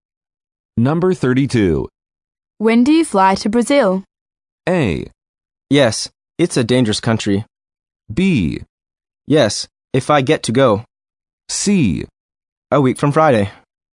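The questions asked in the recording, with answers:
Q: When do you fly to Brazil?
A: C: A week from Friday.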